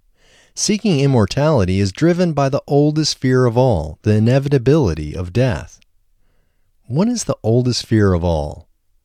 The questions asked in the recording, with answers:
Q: What is the oldest fear of all?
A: The inevitability of death is the oldest fear of all.